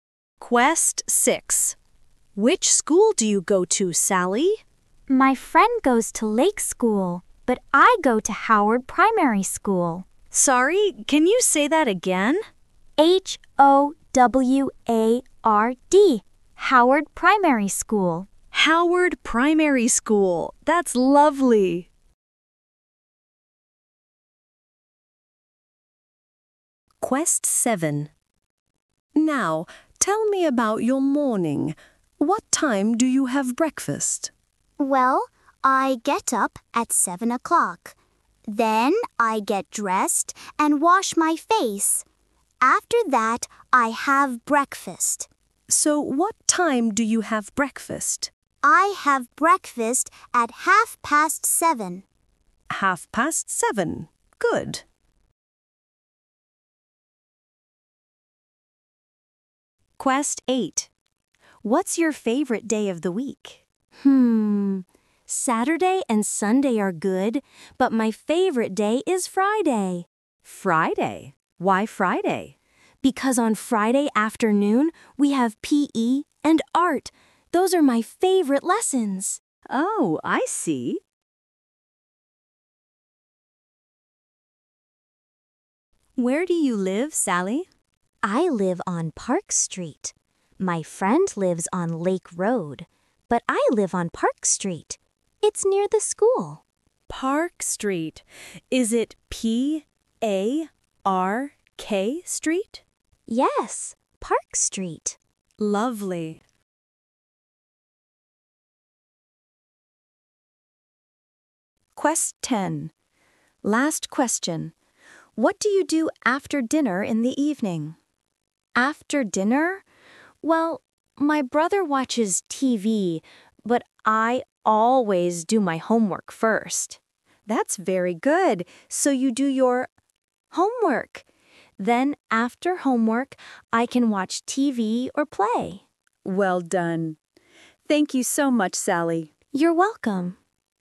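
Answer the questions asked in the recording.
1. Howard Primary School
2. 7:30
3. Friday
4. Park Street
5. do homework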